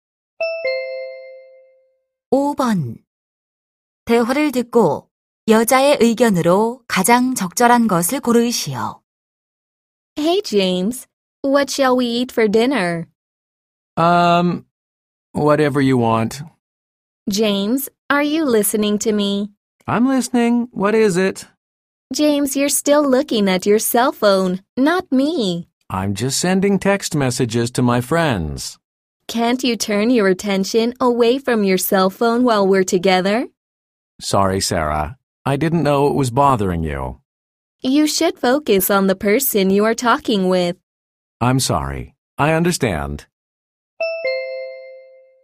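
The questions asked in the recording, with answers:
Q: 대화를 듣고 여자의 의견으로 가장 적절한 것을 고르시오.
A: 대화 중에는 상대방에게 집중해야 한다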